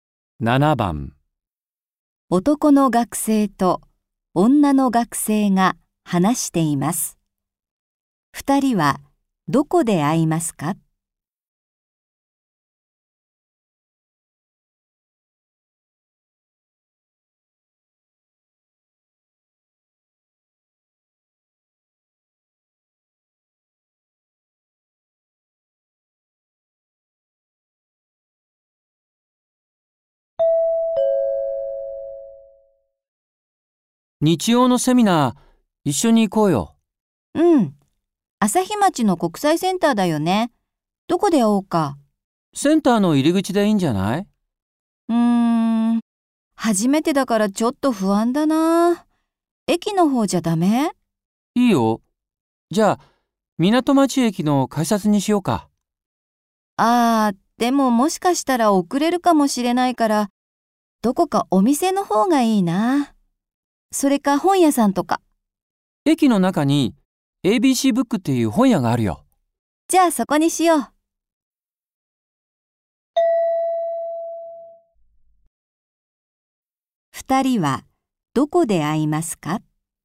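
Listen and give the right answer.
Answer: 駅の中の本屋(ABCブック)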